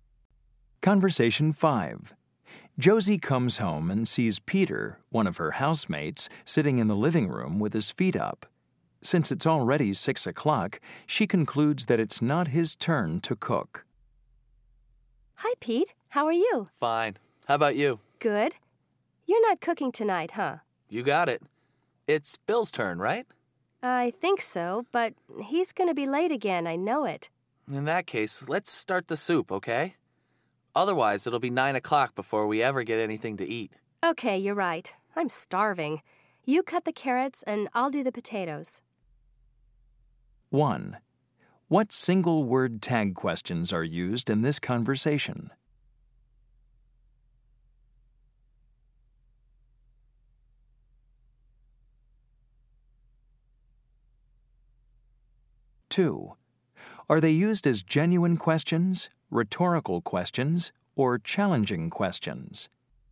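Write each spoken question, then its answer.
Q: What single word tag questions are used in this conversation?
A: huh, right, okay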